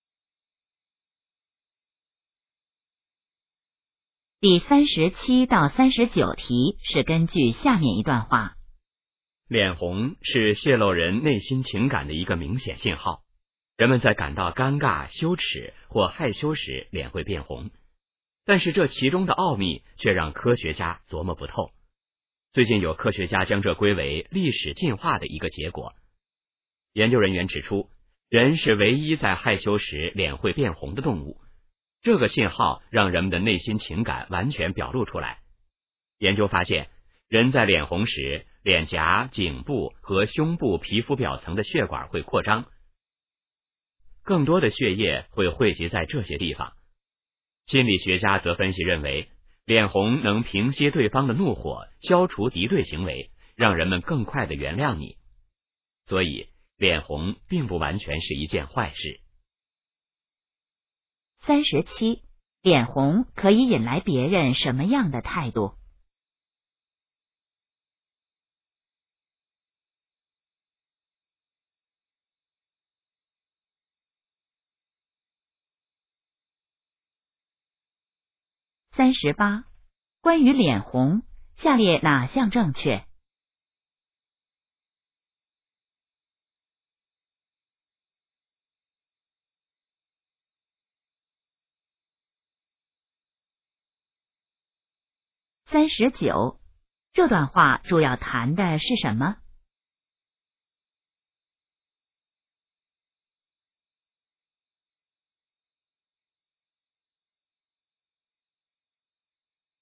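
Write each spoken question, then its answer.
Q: 脸红可以引来别人什么样的态度?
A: 更快地原谅你

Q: 这段话主要谈的是什么?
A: 脸红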